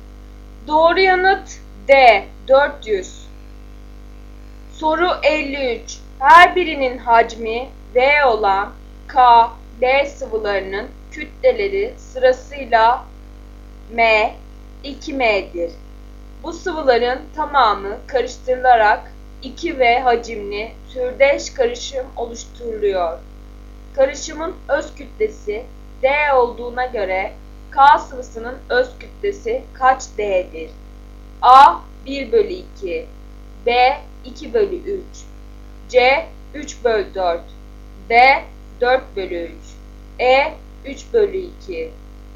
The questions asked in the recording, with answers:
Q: Karışımın öz kütlesi D olduğuna göre K sıvısının öz kütlesi kaç D'dir?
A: Doğru yanıt B 2 bölü 3.